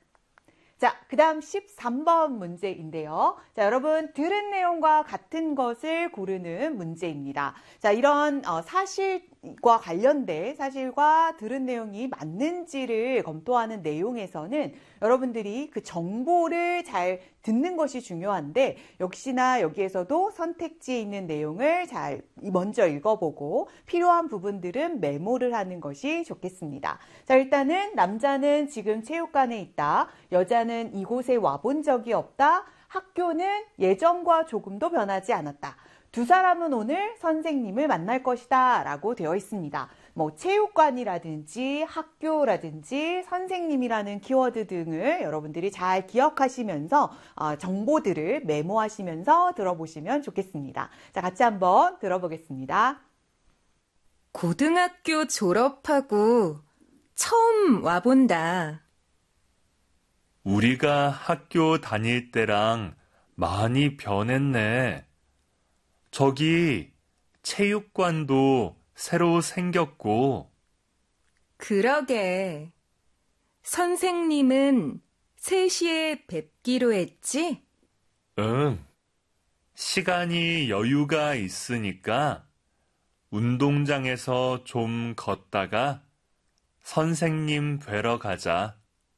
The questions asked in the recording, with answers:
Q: 들은 내용과 같은 것을 고르는 문제입니다.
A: 이 13번의 정답은 4번이 되겠습니다.